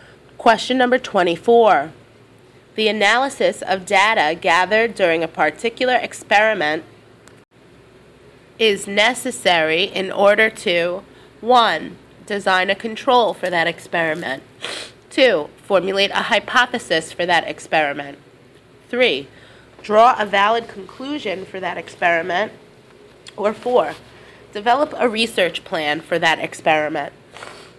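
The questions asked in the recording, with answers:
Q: The analysis of data gathered during a particular experiment is necessary in order to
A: 3: Draw a valid conclusion for that experiment.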